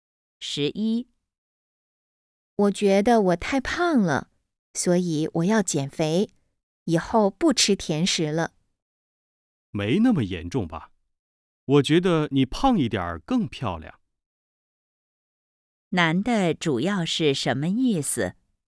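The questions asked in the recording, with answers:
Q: 男的主要是什么意思?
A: 女的不用减肥,胖一点更漂亮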